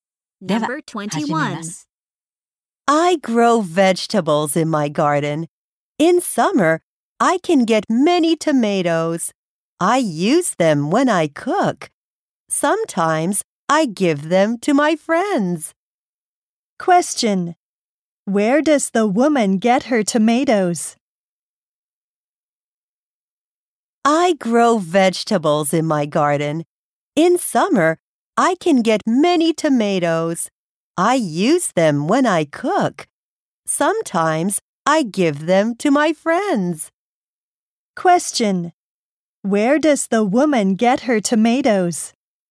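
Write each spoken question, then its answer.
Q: Question. Where does the woman get her tomatoes?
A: From her garden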